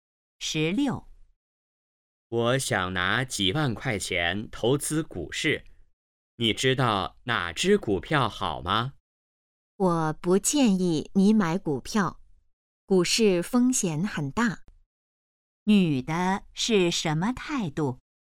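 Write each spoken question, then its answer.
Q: 女的是什么态度?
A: 不建议买股票(反对)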